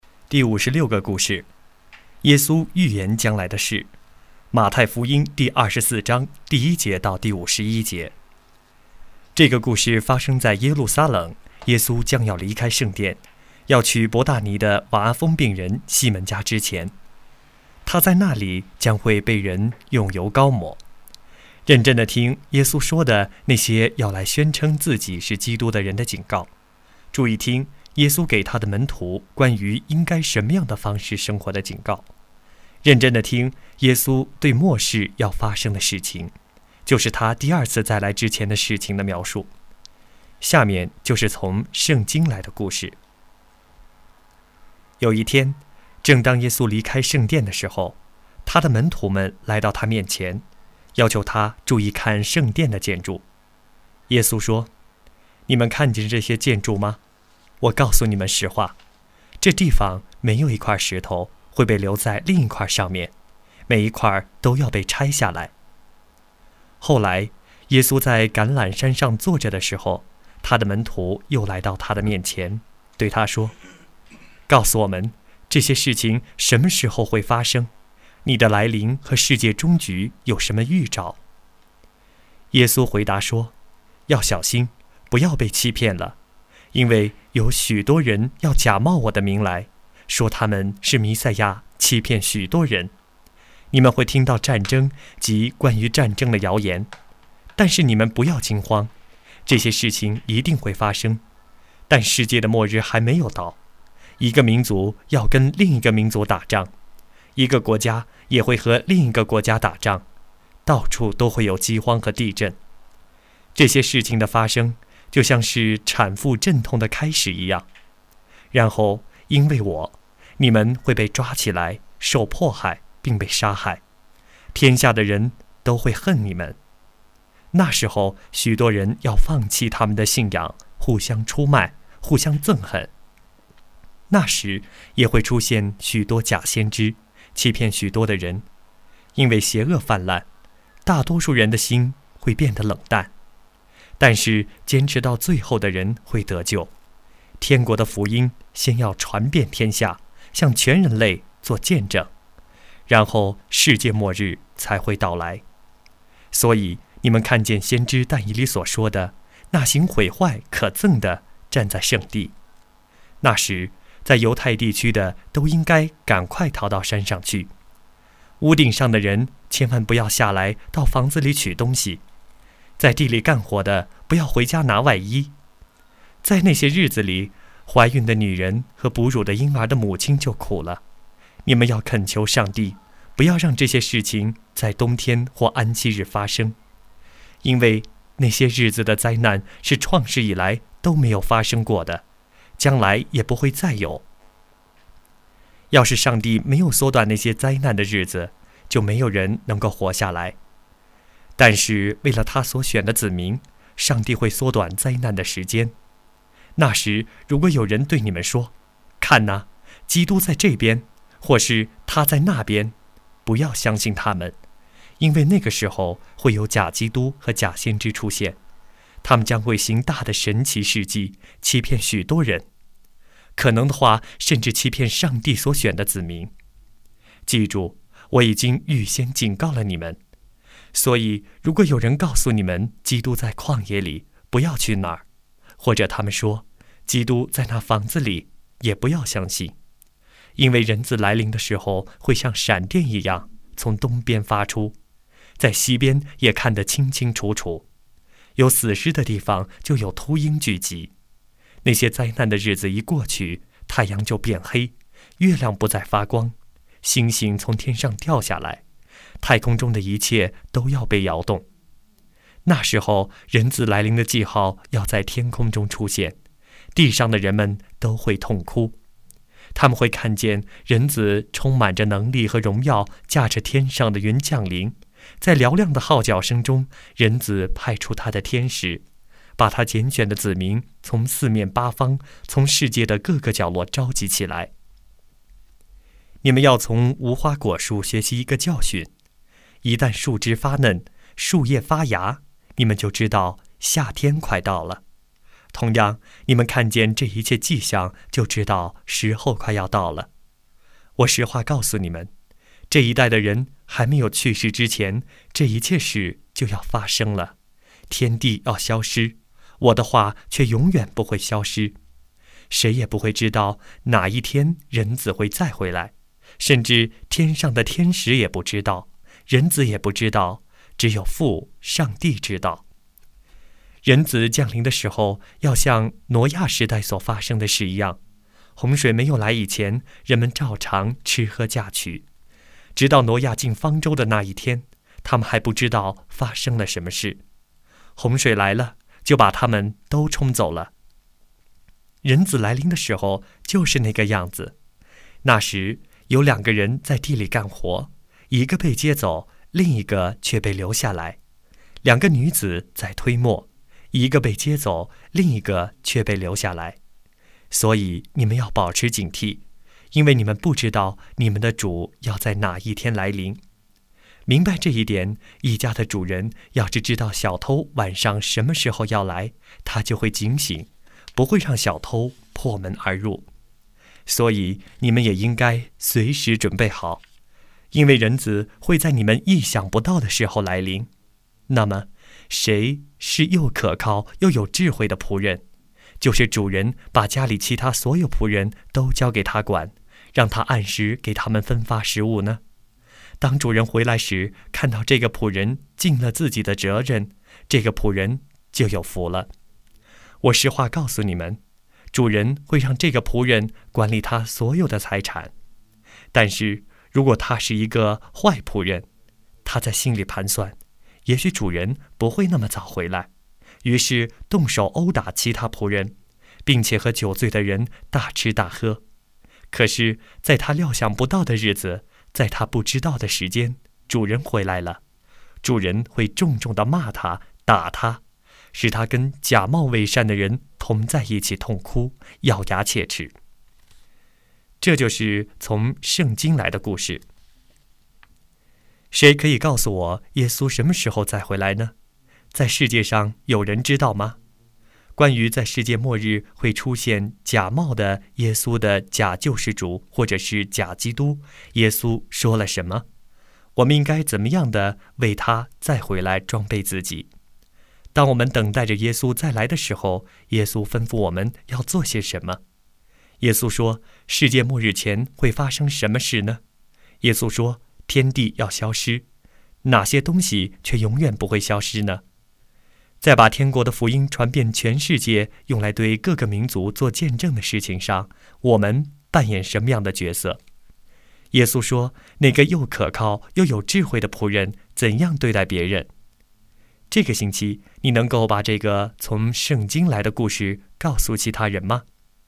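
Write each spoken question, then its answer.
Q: 谁可以告诉我耶稣什么时候再回来呢?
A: 没有人知道,只有父上帝知道

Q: 在世界上有人知道吗?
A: 没有人知道,连天使和人子也不知道,只有父上帝知道

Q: 关于在世界末日会出现假冒的耶稣的假救世主或者是假基督,耶稣说了什么?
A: 不要相信他们,他们会行神奇事迹欺骗许多人

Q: 耶稣说,世界末日前会发生什么事呢?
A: 战争和战争的谣言、饥荒、地震、迫害、假先知出现,福音传遍天下

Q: 耶稣说,天地要消失,哪些东西却永远不会消失呢?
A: 耶稣的话

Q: 耶稣说,那个又可靠又有智慧的仆人怎样对待别人?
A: 按时给其他仆人分发食物,尽自己的责任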